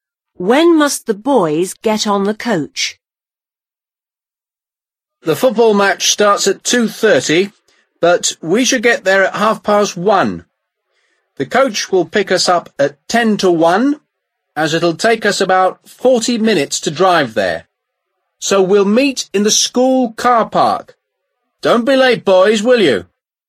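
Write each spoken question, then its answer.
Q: When must the boys get on the coach?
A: At ten to one (12:50)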